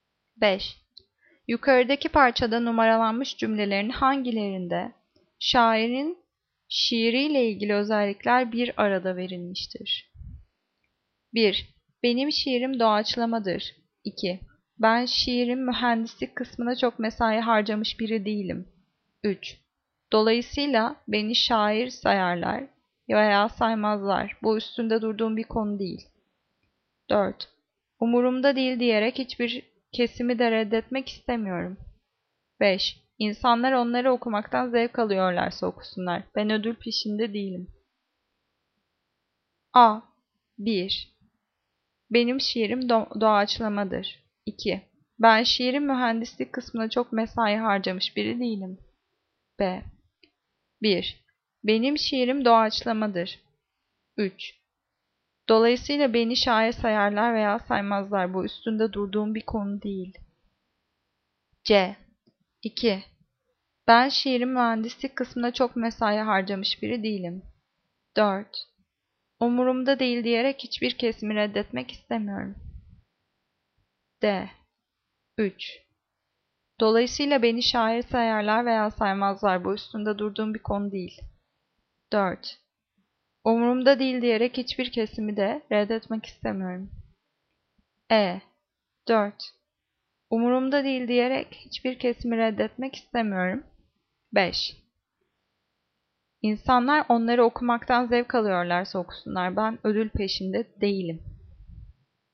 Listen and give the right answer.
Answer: Cevap A. 1. Benim şiirim doğaçlamadır.